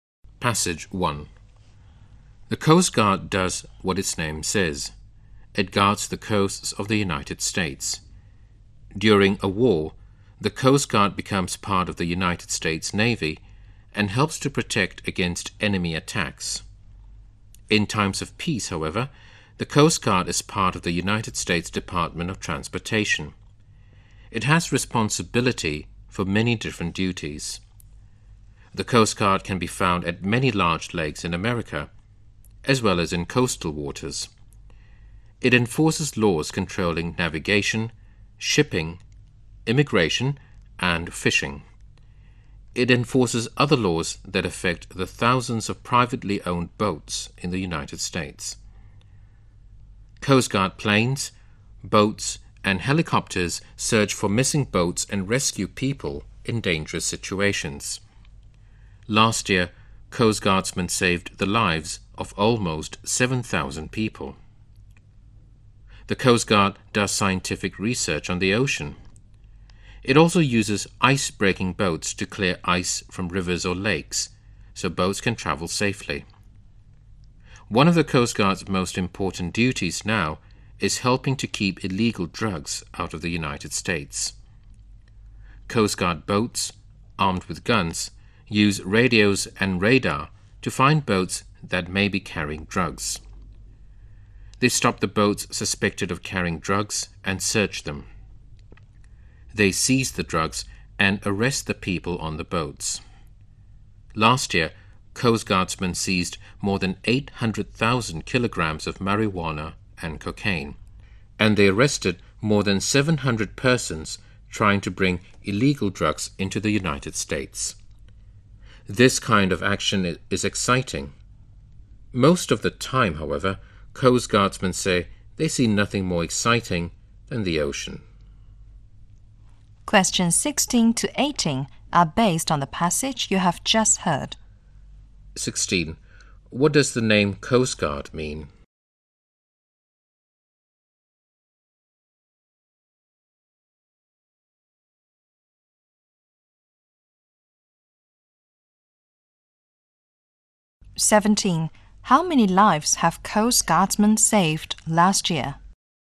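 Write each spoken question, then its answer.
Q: What does the name Coast Guard mean?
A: It guards the coasts of the United States.

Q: How many lives have Coast Guardsmen saved last year?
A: Almost 7,000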